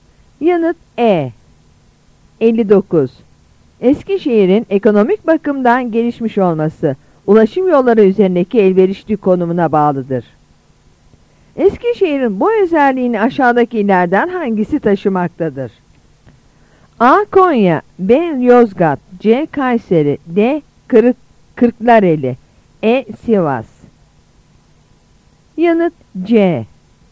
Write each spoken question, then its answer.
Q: Eskişehir'in bu özelliğini aşağıdakilerden hangisi taşımaktadır?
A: Yanıt C.